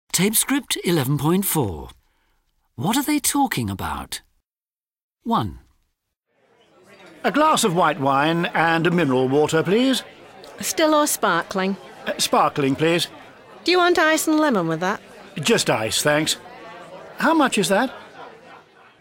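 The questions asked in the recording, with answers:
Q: What are they talking about?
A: ordering drinks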